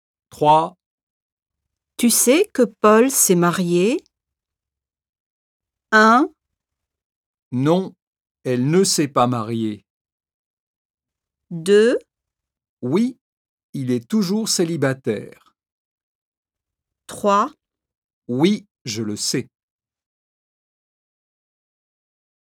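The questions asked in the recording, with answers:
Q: Tu sais que Paul s'est marié?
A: 3: Oui, je le sais.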